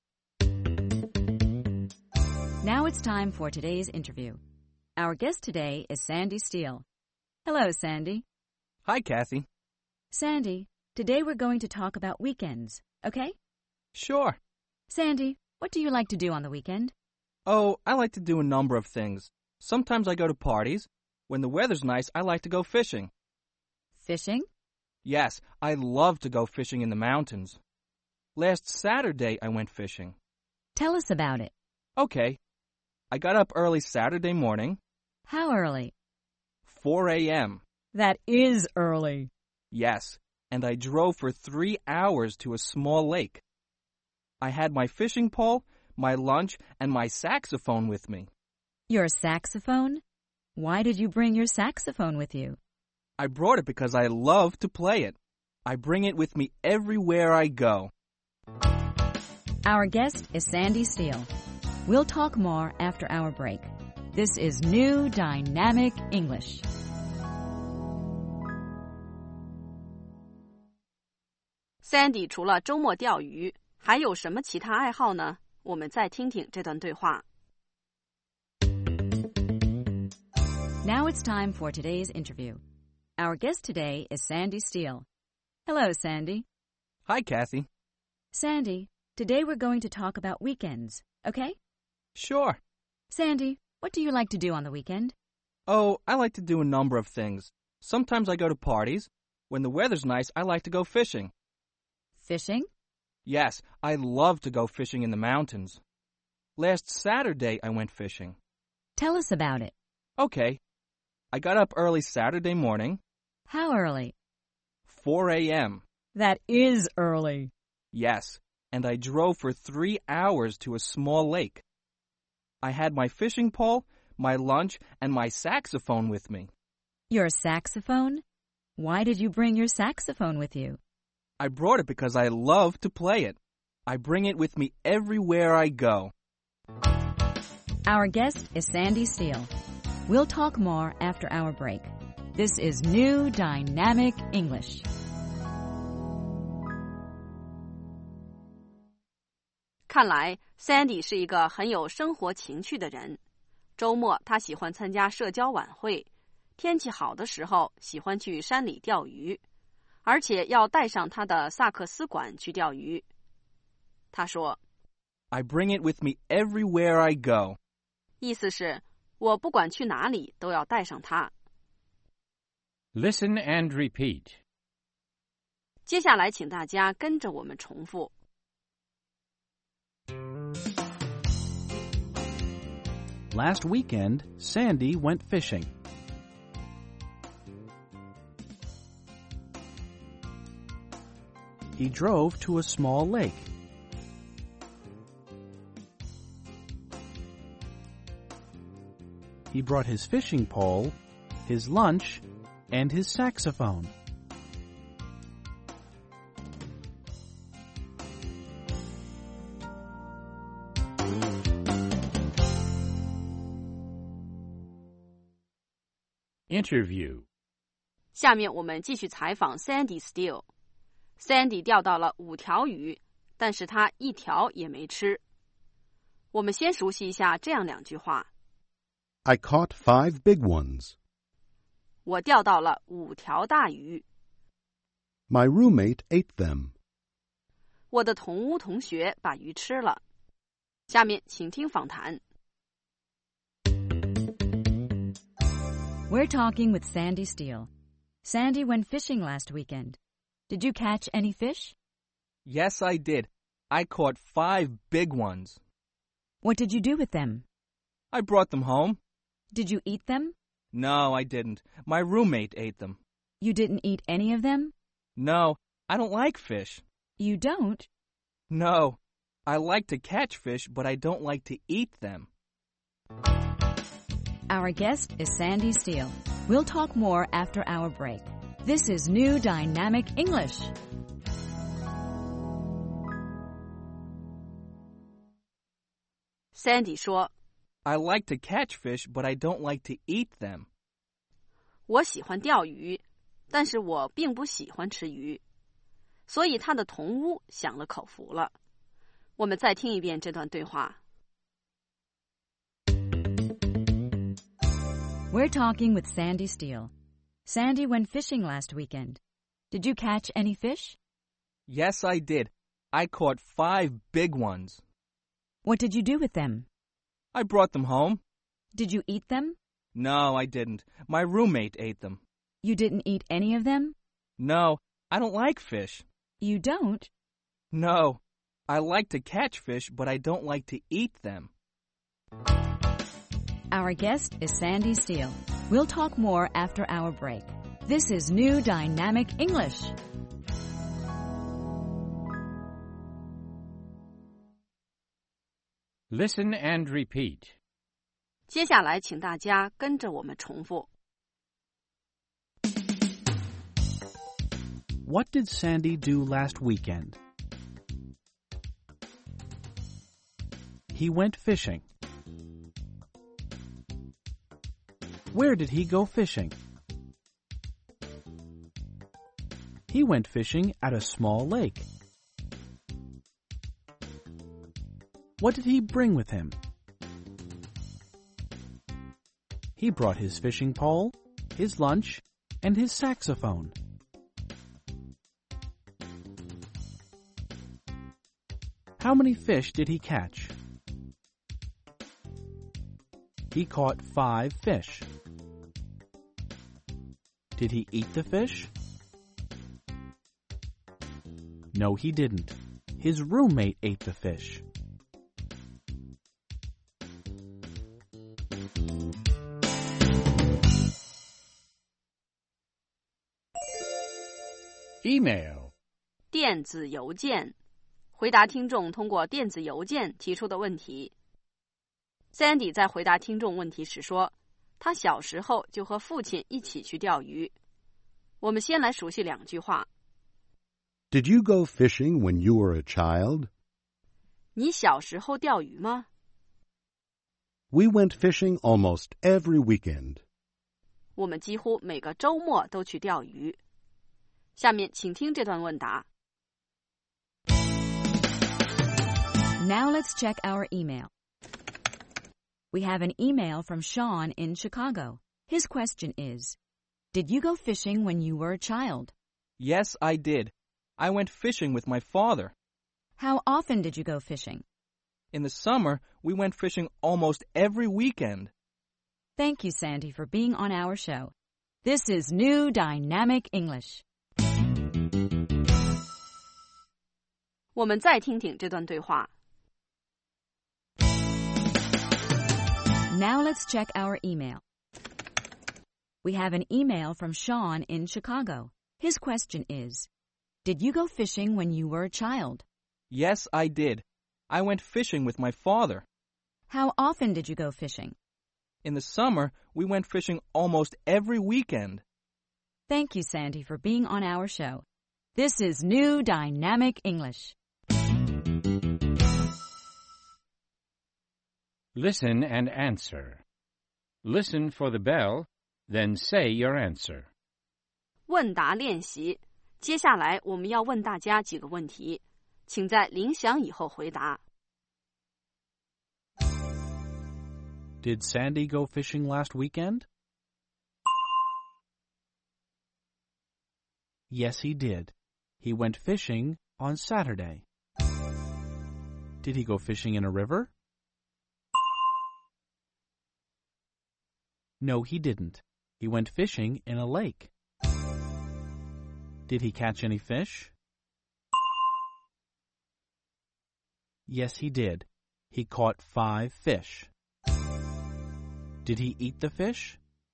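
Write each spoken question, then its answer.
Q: Did Sandy go fishing last weekend?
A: Yes, he did. He went fishing on Saturday.

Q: Did he go fishing in a river?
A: No, he didn't. He went fishing in a lake.

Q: Did he catch any fish?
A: Yes, he did. He caught 5 fish.

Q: Did he eat the fish?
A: No, he didn't. He doesn't like to eat fish.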